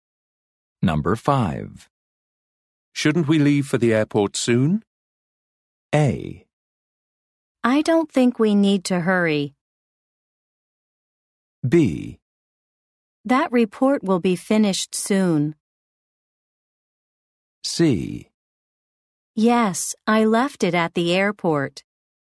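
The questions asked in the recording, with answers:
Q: Shouldn't we leave for the airport soon?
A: A: I don't think we need to hurry.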